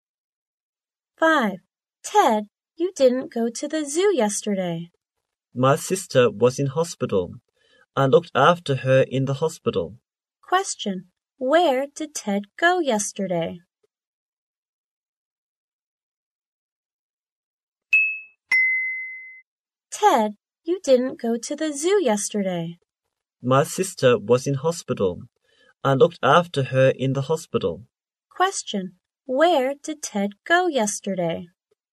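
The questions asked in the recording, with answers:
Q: Where did Ted go yesterday?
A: To the hospital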